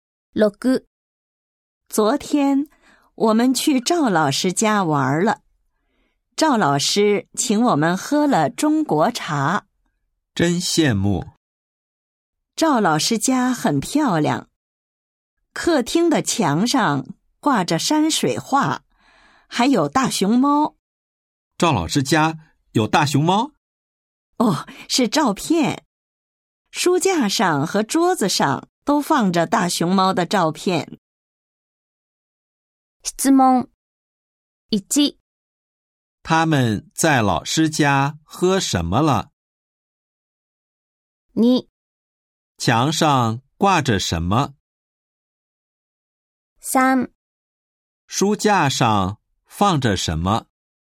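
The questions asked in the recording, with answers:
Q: 他们在老师家喝什么了?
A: 中国茶

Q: 墙上挂着什么?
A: 山水画

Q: 书架上放着什么?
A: 大熊猫的照片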